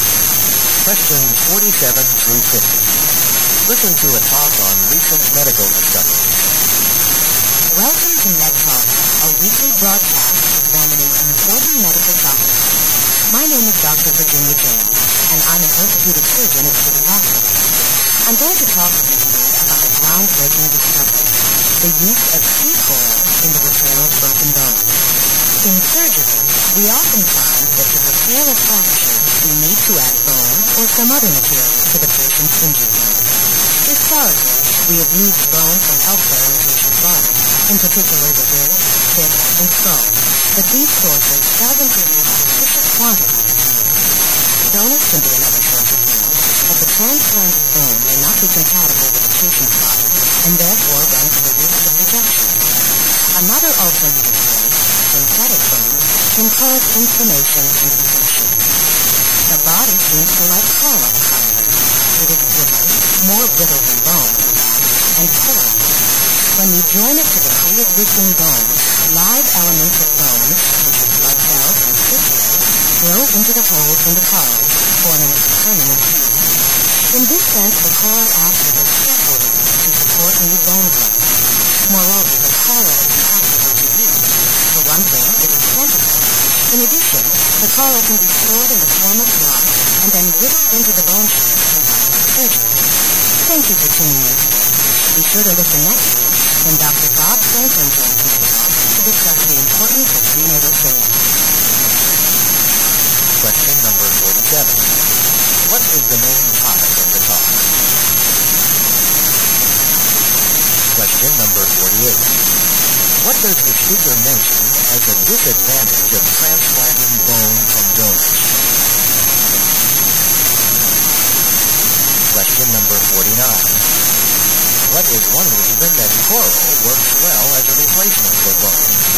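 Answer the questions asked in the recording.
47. Using coral to repair broken bones
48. The patient's body may reject it
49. Bone grows into its pores and forms a permanent seal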